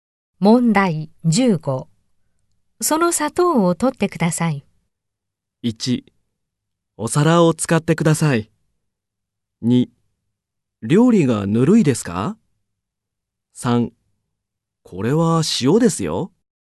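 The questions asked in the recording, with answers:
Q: その砂糖を取ってください。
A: 2: これは塩ですよ。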